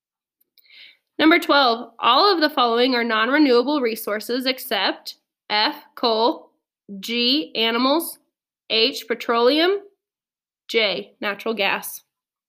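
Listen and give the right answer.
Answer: G: animals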